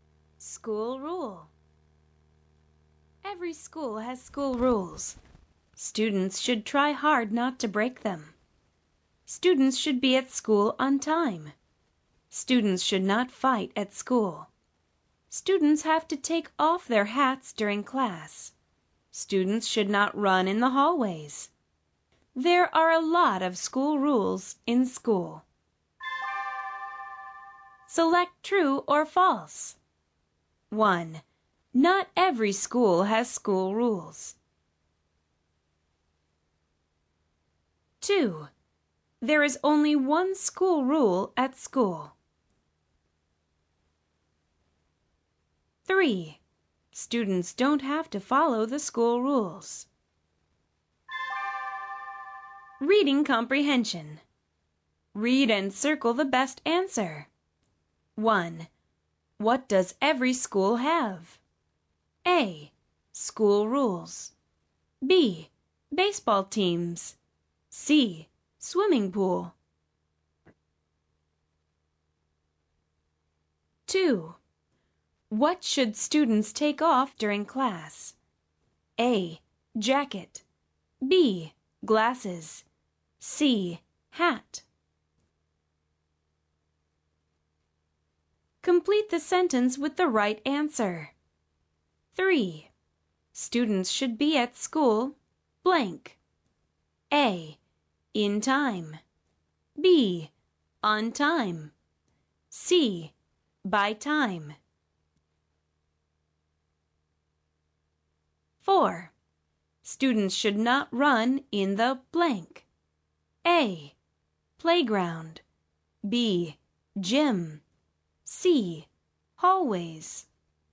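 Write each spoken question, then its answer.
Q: Not every school has school rules.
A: False

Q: There is only one school rule at school.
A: False

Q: Students don't have to follow the school rules.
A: False

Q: What does every school have?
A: A: School rules.

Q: What should students take off during class?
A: C: Hat.

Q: Students should be at school, blank.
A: B: On time.

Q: Students should not run in the blank.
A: C: Hallways.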